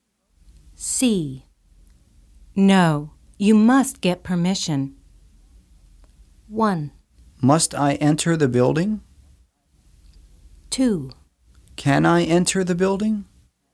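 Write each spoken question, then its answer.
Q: No, you must get permission.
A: 2: Can I enter the building?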